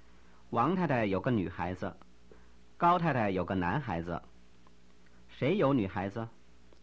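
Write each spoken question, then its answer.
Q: 谁有女孩子?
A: 王太太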